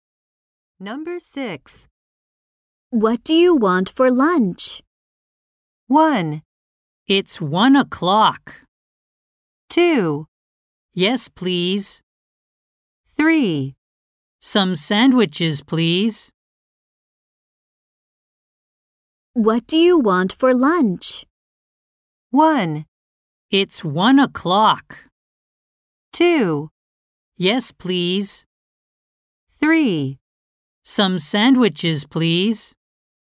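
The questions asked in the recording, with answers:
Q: What do you want for lunch?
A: 3: Some sandwiches, please.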